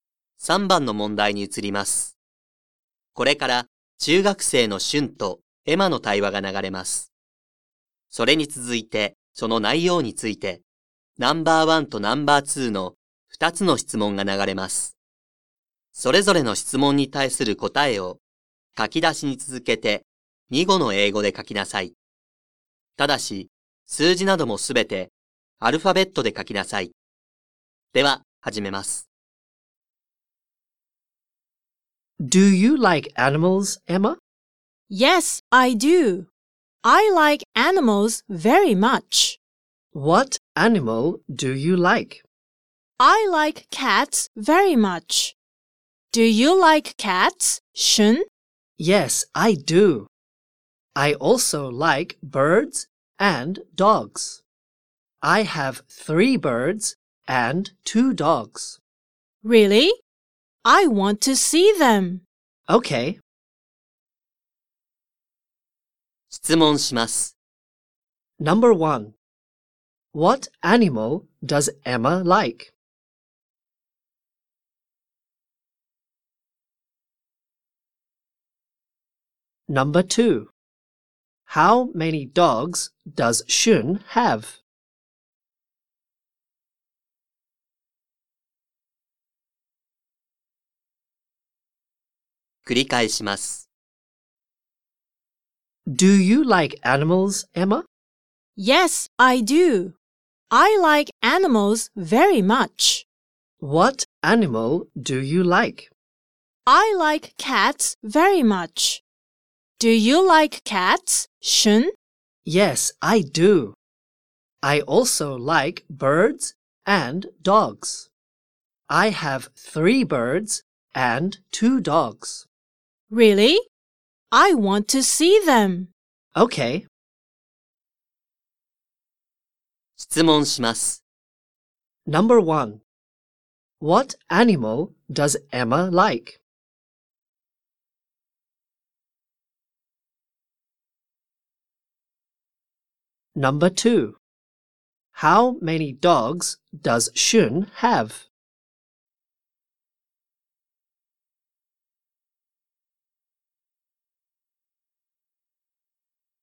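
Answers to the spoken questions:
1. Cats.
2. Two dogs.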